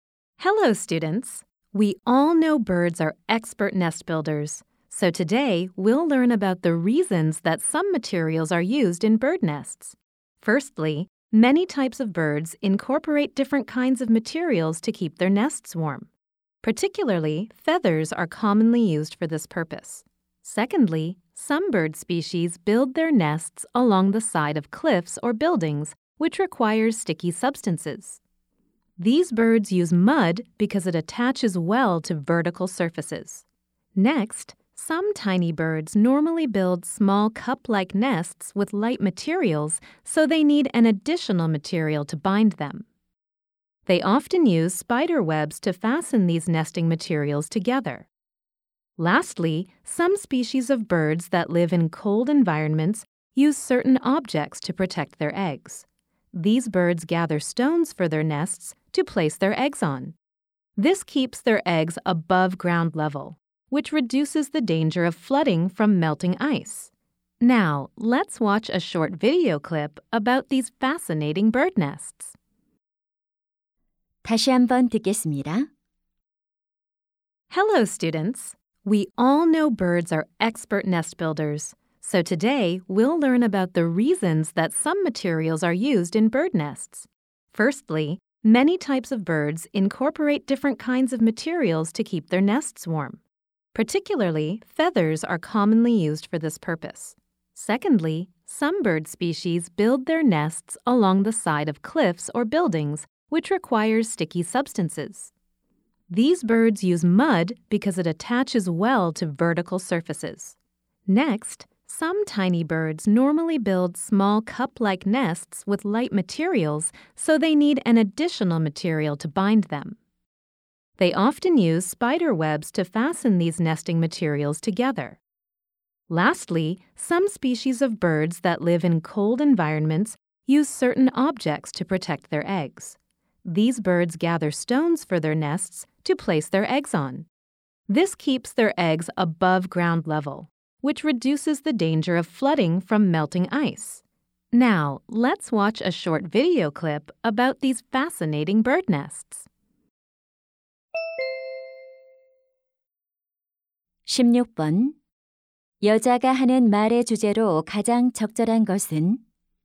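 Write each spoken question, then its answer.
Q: 여자가 하는 말의 주제로 가장 적절한 것은?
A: 새들이 둥지에 특정 재료를 사용하는 이유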